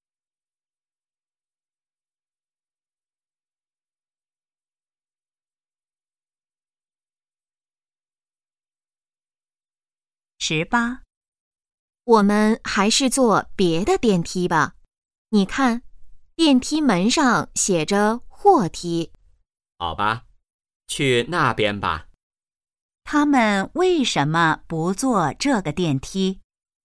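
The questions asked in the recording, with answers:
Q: 他们为什么不坐这个电梯?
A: 那是货梯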